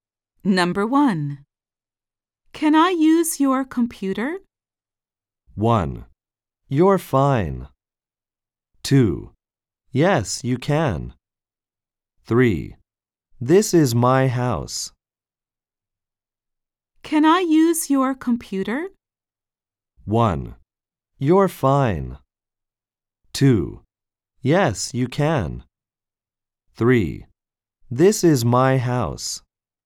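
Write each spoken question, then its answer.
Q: Can I use your computer?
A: 2: Yes, you can.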